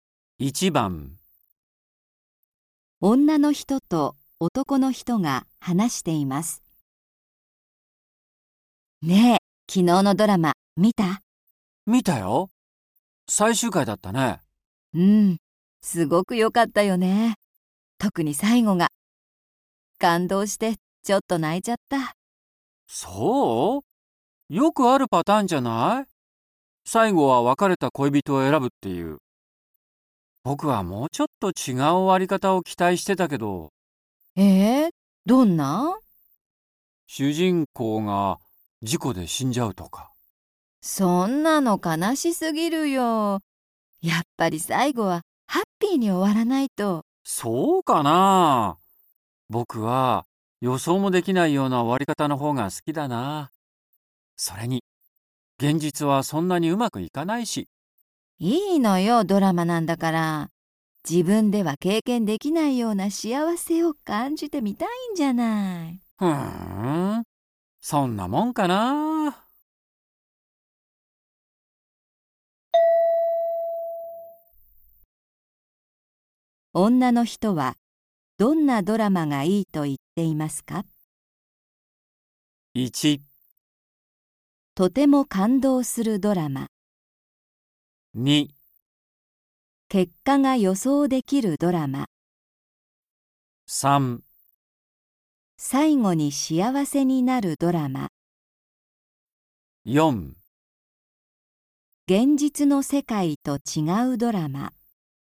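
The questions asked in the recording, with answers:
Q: 女の人はどんなドラマがいいと言っていますか?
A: 3: 最後に幸せになるドラマ。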